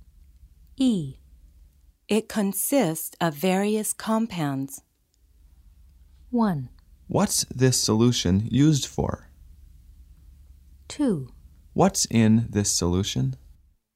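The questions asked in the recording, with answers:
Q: It consists of various compounds.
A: 2: What's in this solution?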